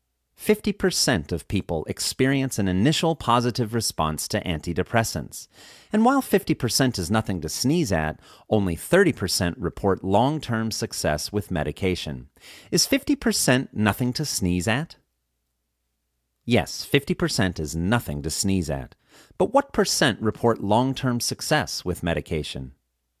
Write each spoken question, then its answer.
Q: But what percent report long-term success with medication?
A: Only 30% report long-term success with medication.